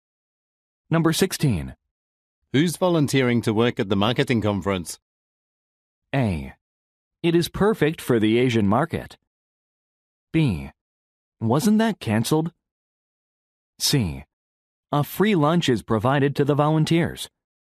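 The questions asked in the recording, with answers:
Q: Who's volunteering to work at the marketing conference?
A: B: Wasn't that cancelled?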